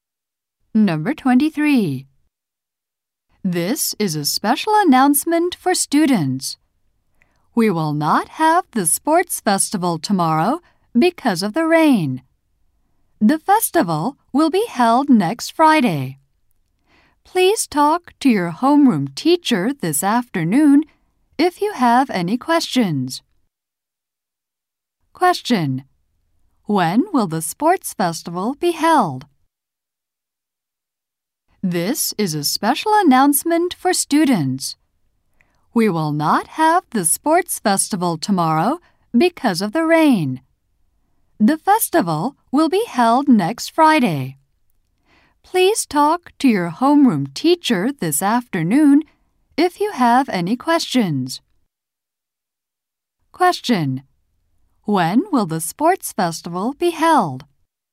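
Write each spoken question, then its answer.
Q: When will the sports festival be held?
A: Next Friday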